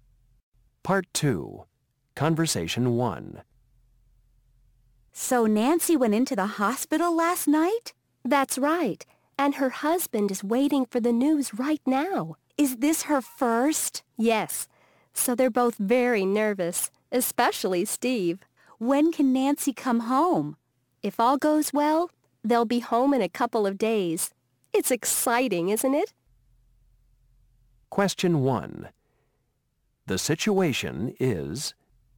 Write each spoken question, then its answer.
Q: The situation is...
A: Yes, having your first baby is always very special.